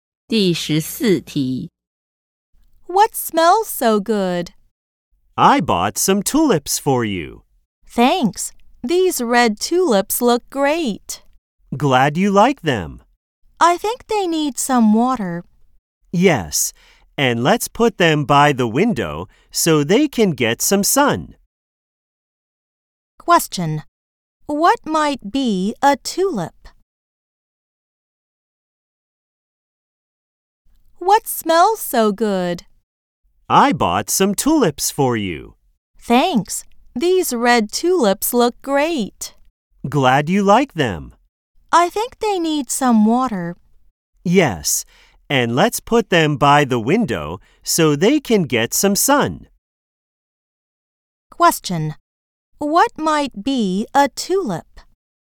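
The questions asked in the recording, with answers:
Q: What might be a tulip?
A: A flower (red flowers)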